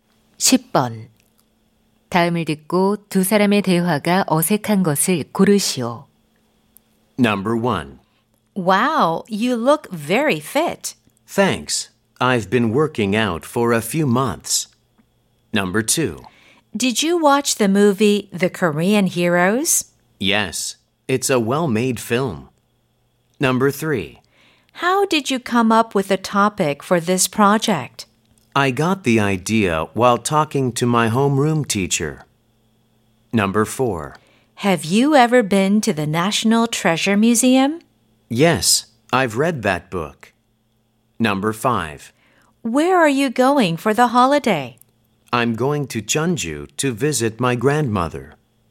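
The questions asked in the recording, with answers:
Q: 다음을 듣고 두 사람의 대화가 어색한 것을 고르시오.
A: 4: Have you ever been to the National Treasure Museum? / Yes, I've read that book.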